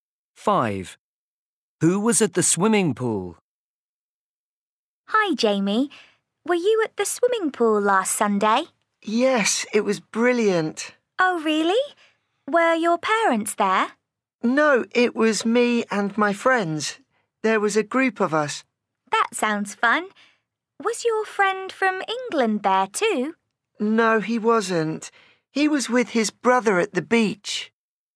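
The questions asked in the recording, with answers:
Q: Who was at the swimming pool?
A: Jamie and his friends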